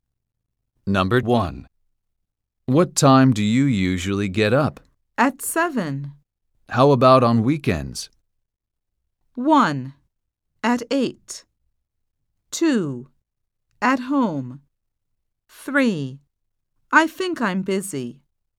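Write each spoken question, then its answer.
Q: How about on weekends?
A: 1: At 8.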